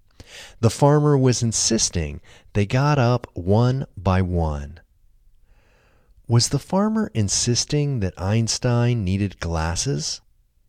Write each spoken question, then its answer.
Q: Was the farmer insisting that Einstein needed glasses?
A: No, the farmer wasn't insisting that Einstein needed glasses.